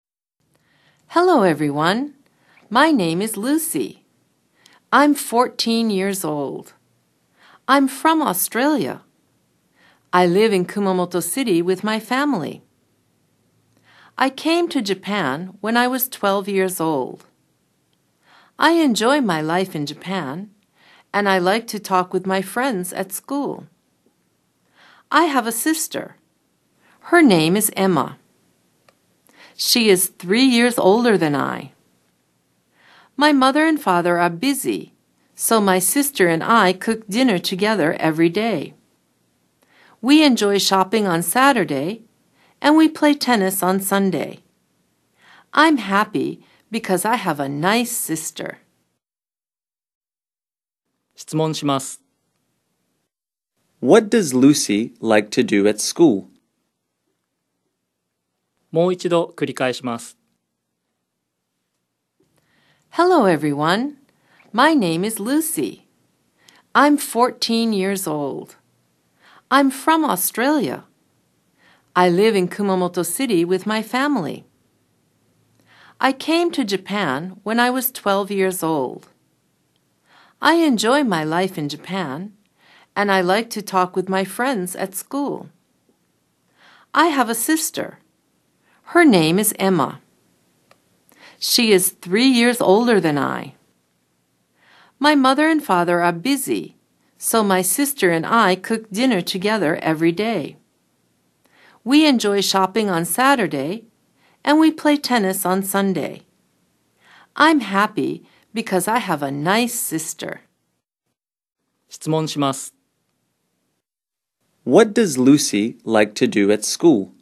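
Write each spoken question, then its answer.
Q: What does Lucy like to do at school?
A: She likes to talk with her friends.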